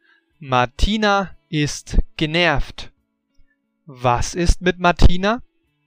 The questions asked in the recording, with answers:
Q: Was ist mit Martina?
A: Sie ist genervt.